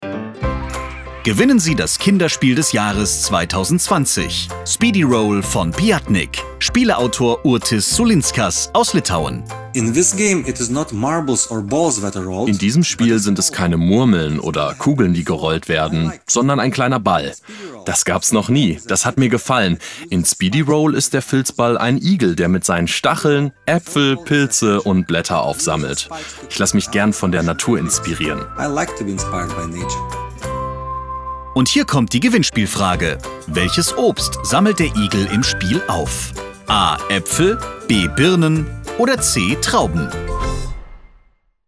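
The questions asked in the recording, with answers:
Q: Welches Obst sammelt der Igel im Spiel auf? A. Äpfel, B. Birnen oder C. Trauben?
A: A: Äpfel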